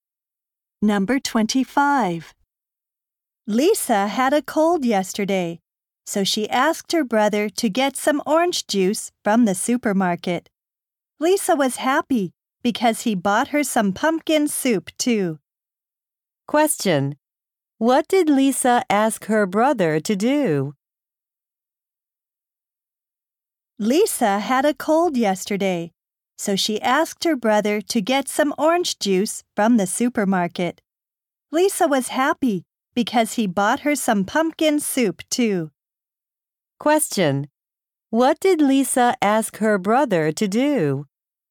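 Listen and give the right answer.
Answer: Get some orange juice from the supermarket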